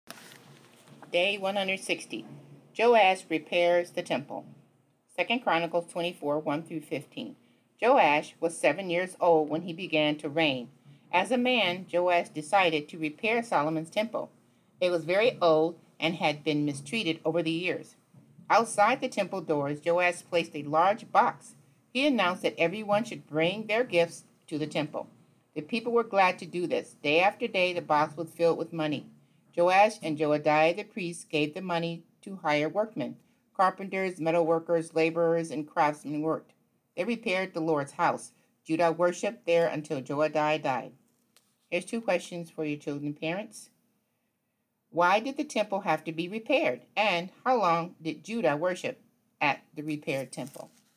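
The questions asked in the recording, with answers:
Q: Why did the temple have to be repaired?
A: It was very old and had been mistreated over the years.

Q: And how long did Judah worship at the repaired temple?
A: Until Joadiah died.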